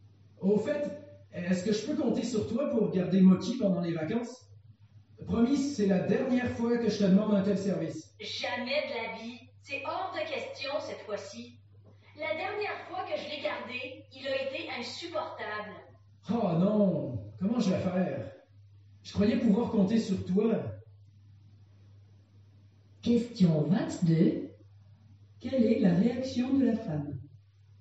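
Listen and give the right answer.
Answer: Elle refuse catégoriquement de garder Mochi.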